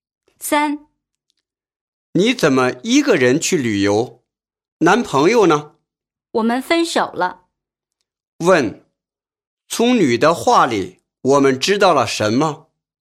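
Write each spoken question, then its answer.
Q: 从女的话里,我们知道了什么?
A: 她和男朋友分手了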